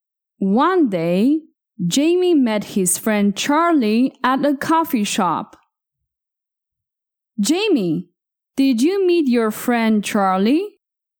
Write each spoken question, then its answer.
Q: Jamie, did you meet your friend Charlie?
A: Yes, I met him. I met my friend Charlie at a coffee shop.